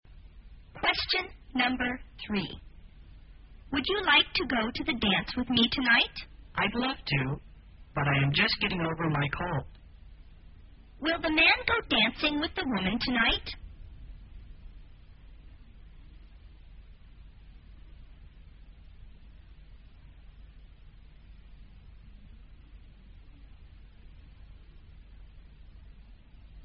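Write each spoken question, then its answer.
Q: Will the man go dancing with the woman tonight?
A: No, he is just getting over a cold.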